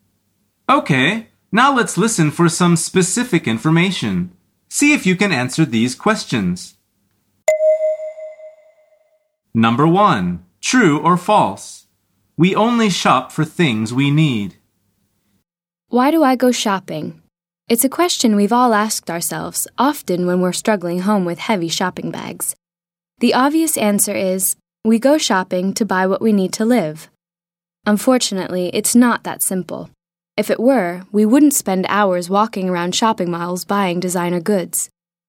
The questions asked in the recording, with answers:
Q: True or false? We only shop for things we need.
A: The answer is false.